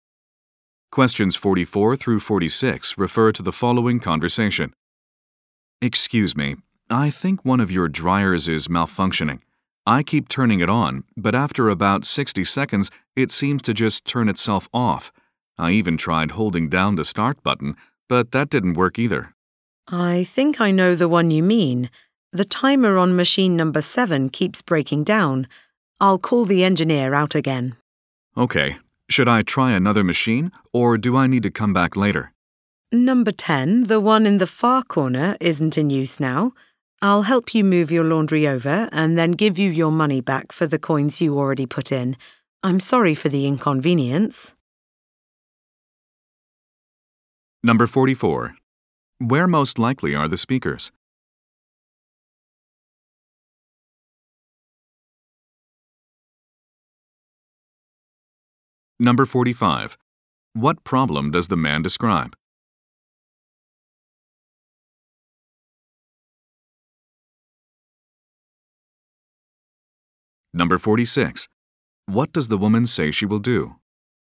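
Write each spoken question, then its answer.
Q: Where most likely are the speakers?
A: At a laundromat

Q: What problem does the man describe?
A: A dryer keeps turning itself off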